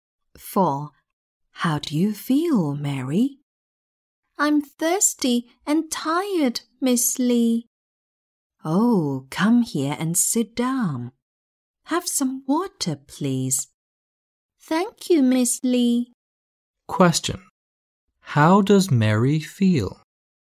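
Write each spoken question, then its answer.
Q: How does Mary feel?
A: thirsty and tired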